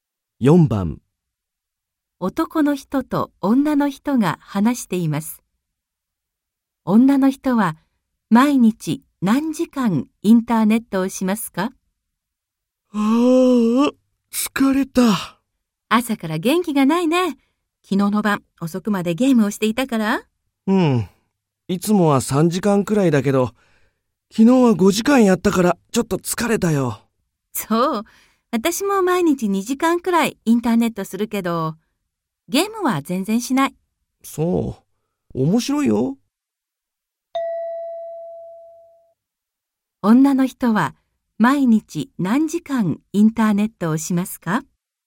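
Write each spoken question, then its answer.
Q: 女の人は毎日何時間インターネットをしますか?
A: 2時間くらい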